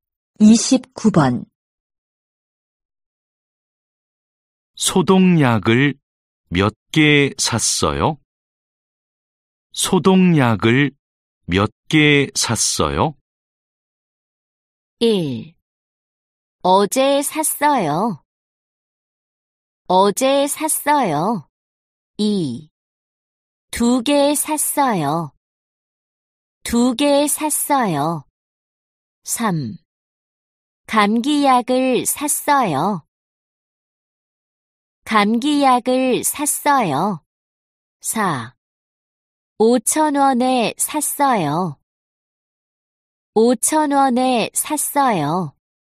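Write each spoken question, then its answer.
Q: 소독약을몇개샀어요?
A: 2: 두개샀어요。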